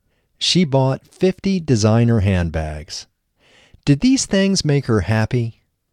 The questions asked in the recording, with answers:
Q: Did these things make her happy?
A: No, these things didn't make her happy.